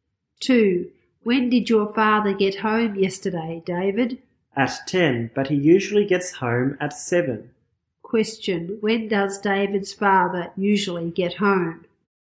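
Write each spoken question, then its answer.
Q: When does David's father usually get home?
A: At 7.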